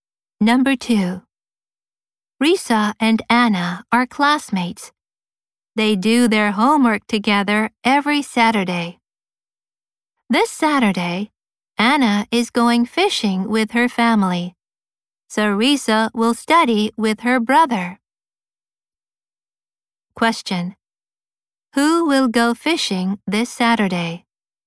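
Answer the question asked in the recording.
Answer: Anna (with her family)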